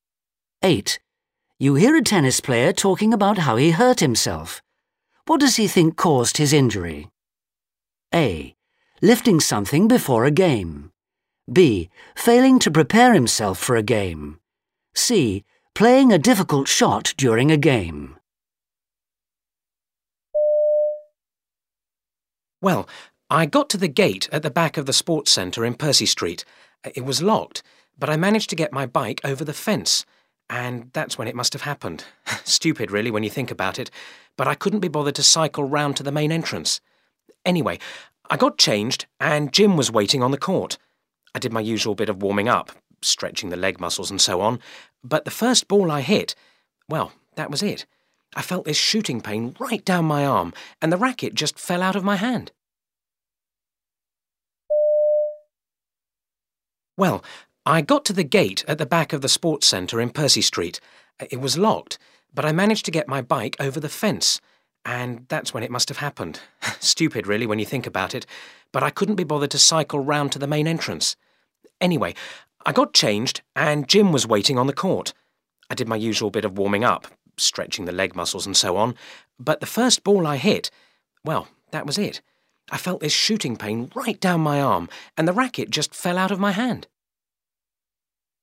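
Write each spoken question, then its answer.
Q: What does he think caused his injury?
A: A: Lifting something before a game.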